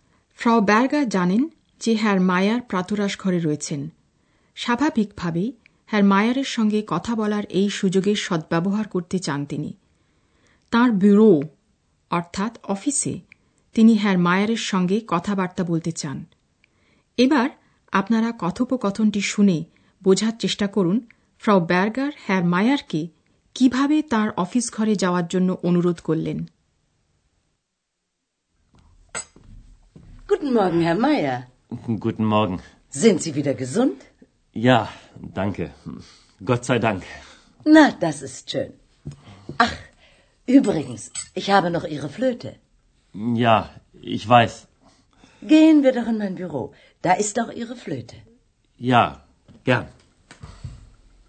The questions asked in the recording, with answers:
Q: এবার আপনারা কথোপকথনটি শুনে বোঝার চেষ্টা করুন ফ্রাউ Berger হ্যার মায়ারকে কিভাবে তার office ঘরে যাওয়ার জন্য অনুরোধ করলেন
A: এবং Frau Berger বন্ধুত্বপূর্ণভাবে হ্যার মায়ারকে অনুরোধ করলেন চলুন আমরা আমার অফিসে যাই